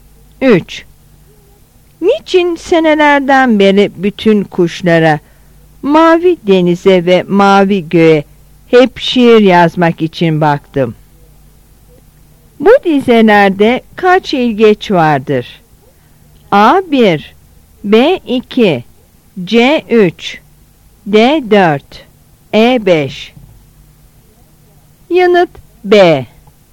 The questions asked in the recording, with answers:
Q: Bu dizelerde kaç ilgeç vardır?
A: Yanıt B.